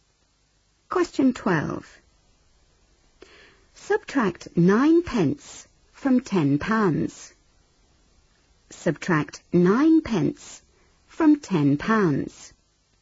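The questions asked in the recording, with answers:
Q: Subtract 9 pence from 10 pounds.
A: £9.91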